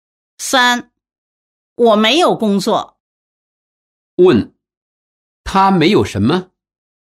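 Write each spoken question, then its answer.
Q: 他没有什么?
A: 工作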